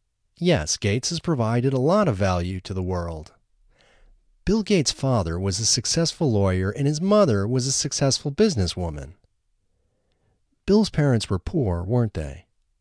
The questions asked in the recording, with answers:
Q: Bill's parents were poor, weren't they?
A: No, Bill's parents weren't poor.